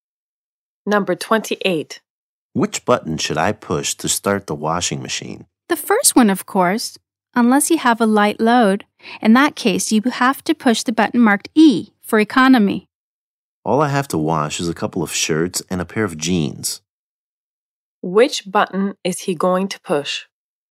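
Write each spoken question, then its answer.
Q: Which button is he going to push?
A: The button marked E for economy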